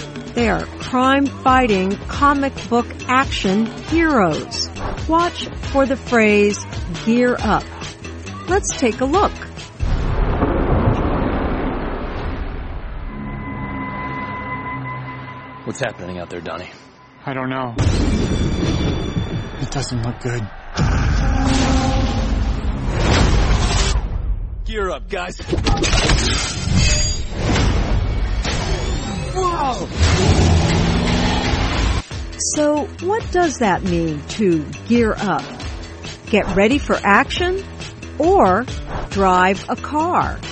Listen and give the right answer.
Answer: To gear up means to get ready for action.